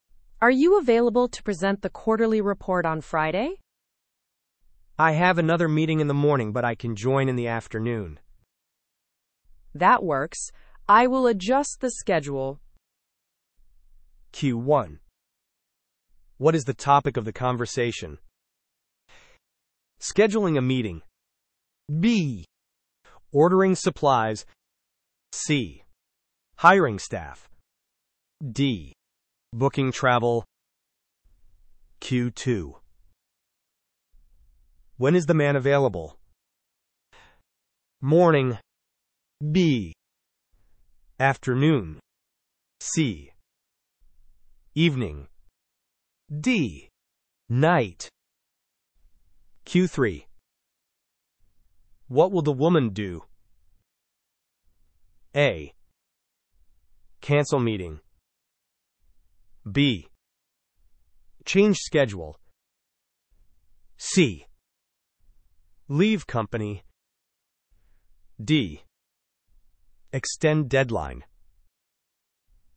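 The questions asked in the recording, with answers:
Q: What is the topic of the conversation?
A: A: Scheduling a meeting.

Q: When is the man available?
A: B: Afternoon.

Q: What will the woman do?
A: B: Change schedule.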